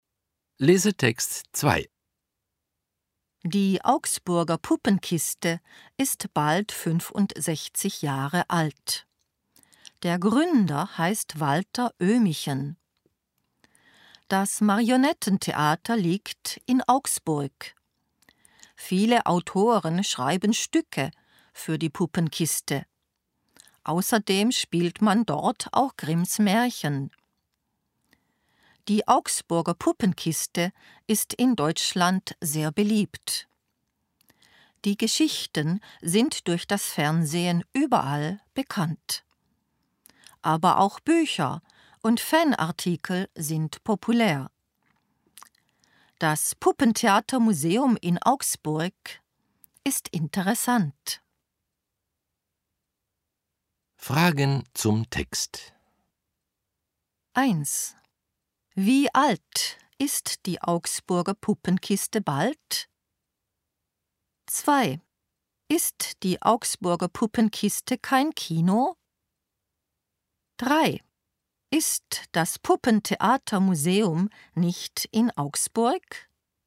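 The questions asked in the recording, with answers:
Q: Wie alt ist die Augsburger Puppenkiste bald?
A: Bald 65 Jahre alt

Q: Ist die Augsburger Puppenkiste kein Kino?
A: Nein, sie ist kein Kino, sondern ein Marionettentheater

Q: Ist das Puppentheatermuseum nicht in Augsburg?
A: Doch, es ist in Augsburg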